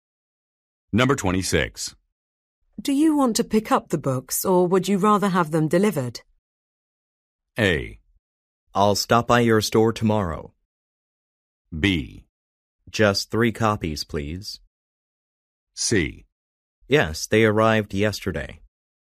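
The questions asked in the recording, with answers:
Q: Do you want to pick up the books or would you rather have them delivered?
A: A: I'll stop by your store tomorrow.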